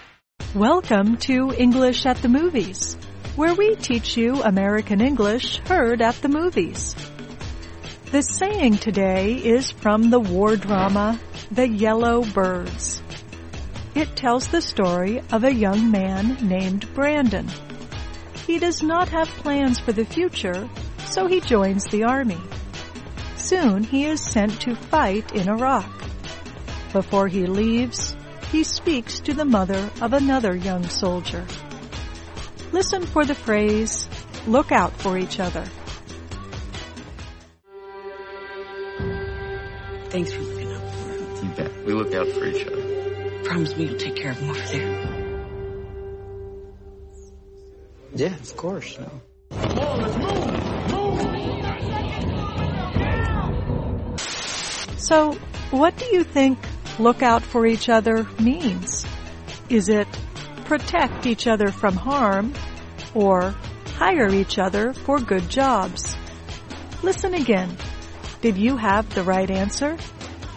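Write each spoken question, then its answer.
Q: So, what do you think look out for each other means?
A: protect each other from harm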